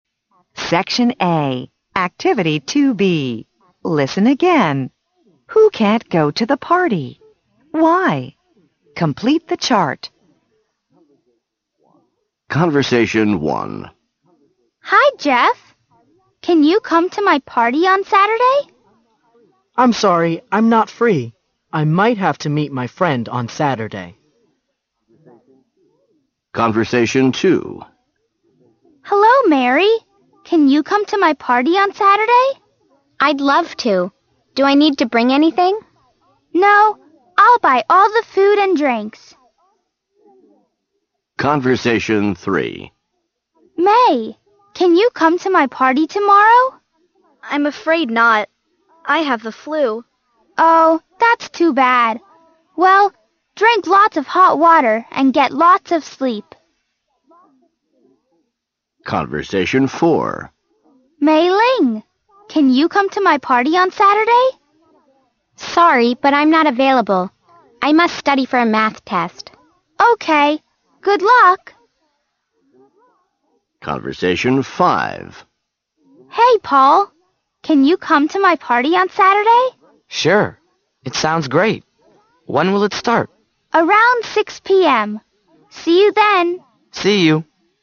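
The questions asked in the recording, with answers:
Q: Who can't go to the party?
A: Jeff, May and Mei Ling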